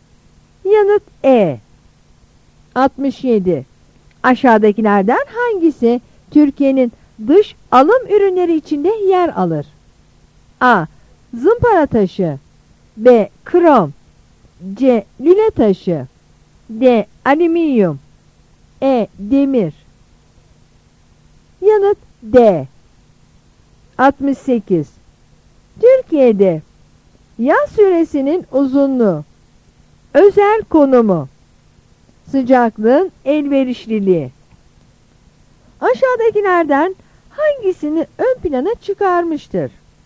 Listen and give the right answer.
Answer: Yanıt D.